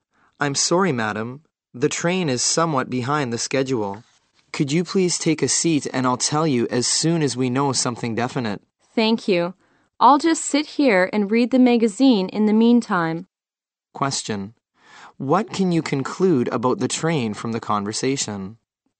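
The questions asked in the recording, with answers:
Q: What can you conclude about the train from the conversation?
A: It is running late.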